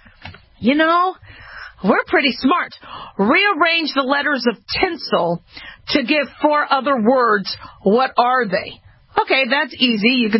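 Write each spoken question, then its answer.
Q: Rearrange the letters of tinsel to give 4 other words.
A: listen, silent, enlist, inlets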